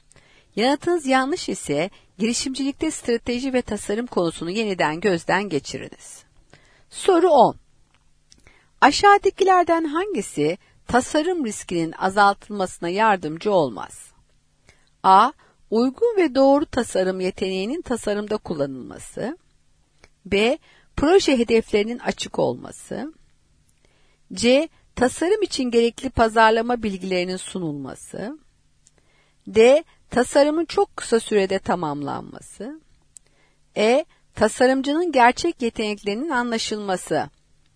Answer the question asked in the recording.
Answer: Doğru cevap D şıkkı, tasarımın çok kısa sürede tamamlanması.